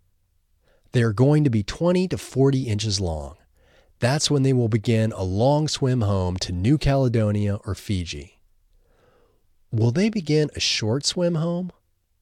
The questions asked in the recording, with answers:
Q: Will they begin a short swim home?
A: No, they won't begin a short swim home.